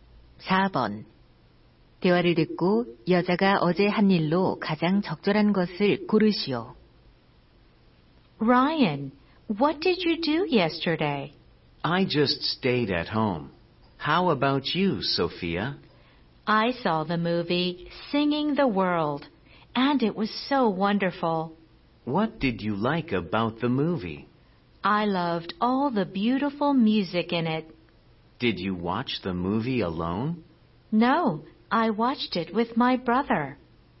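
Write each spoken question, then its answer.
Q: 대화를 듣고 여자가 어제 한 일로 가장 적절한 것을 고르시오.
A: 영화 보기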